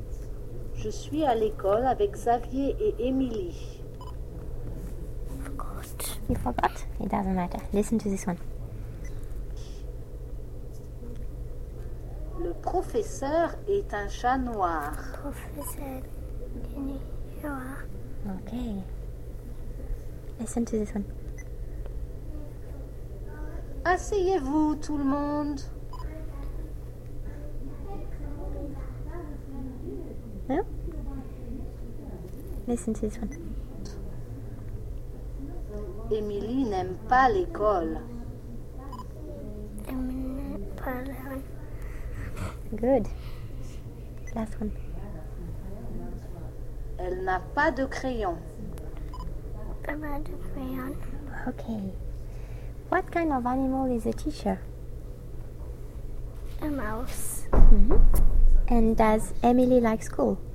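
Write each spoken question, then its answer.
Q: What kind of animal is a teacher?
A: A black cat

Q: And does Emily like school?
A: No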